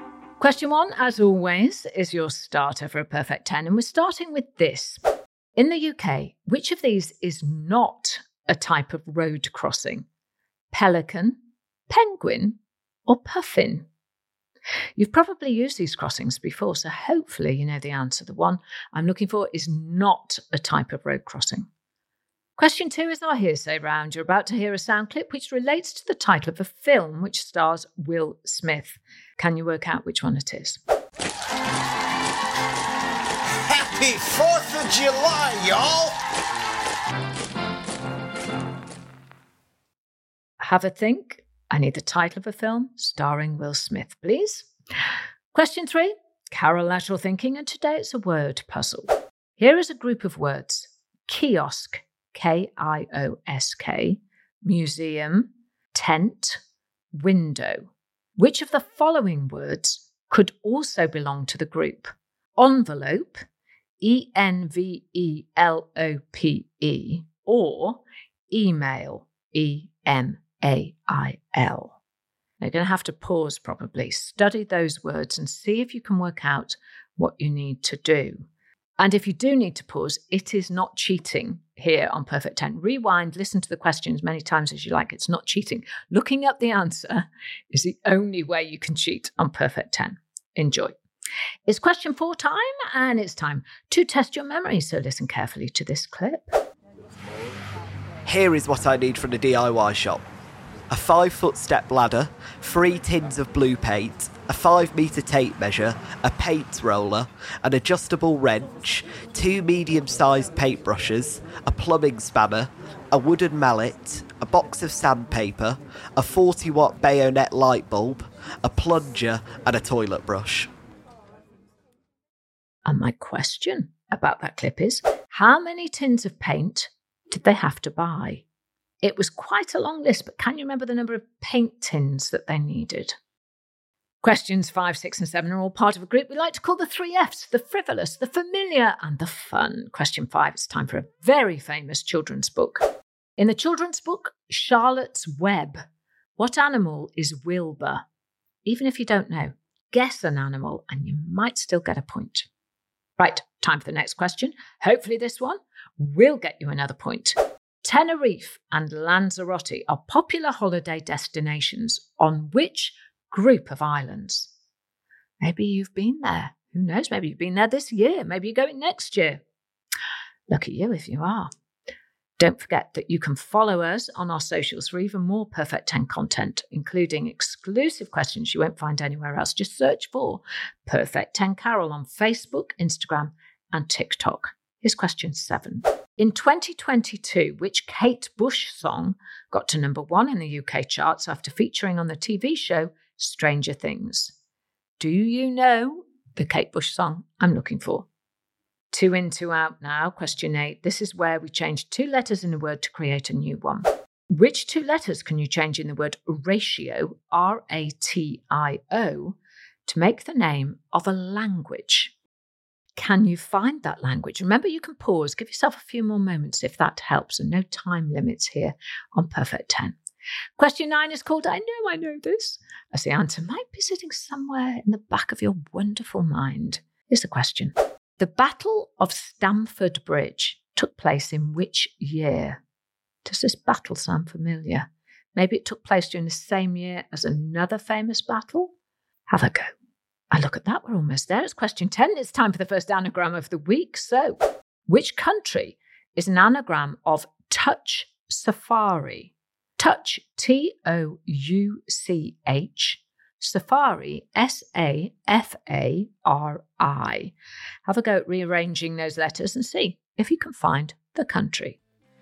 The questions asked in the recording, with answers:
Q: how many tins of paint did they have to buy?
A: And the answer was 3 tins of paint.